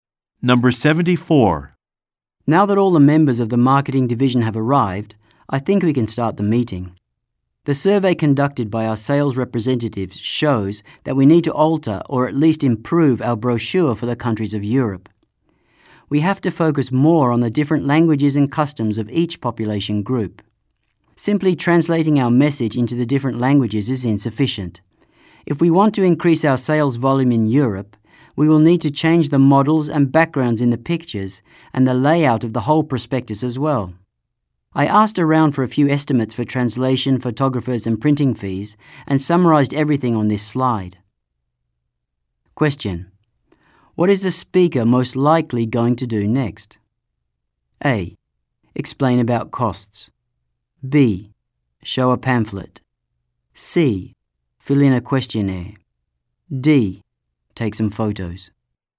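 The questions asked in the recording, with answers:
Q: what is the speaker most likely going to do next?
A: A: Explain about costs.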